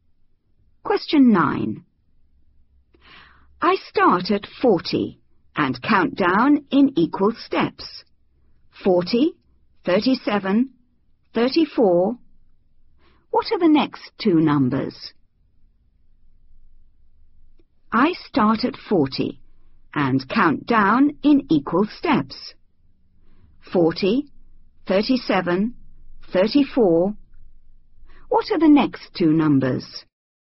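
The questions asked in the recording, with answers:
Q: 40, 37, 34. What are the next two numbers?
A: 31, 28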